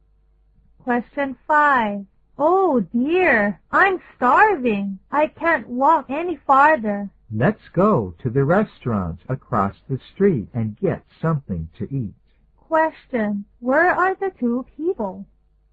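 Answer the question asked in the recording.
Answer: On a street, across from a restaurant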